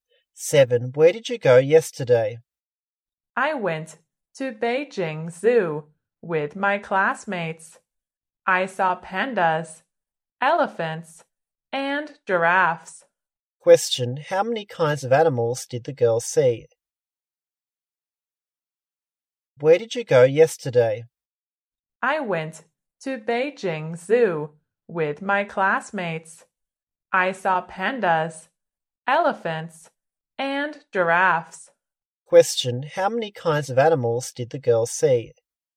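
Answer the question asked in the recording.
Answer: Three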